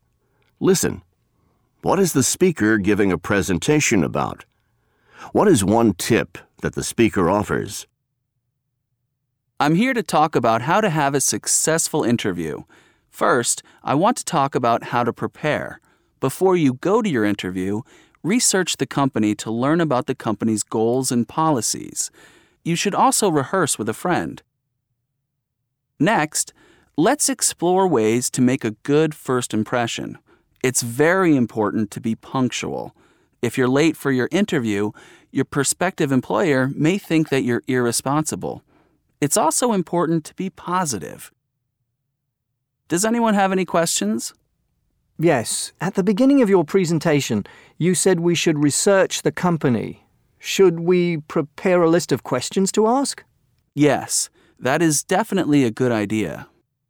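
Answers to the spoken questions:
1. How to have a successful interview
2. Research the company before the interview (also: rehearse with a friend, be punctual, be positive)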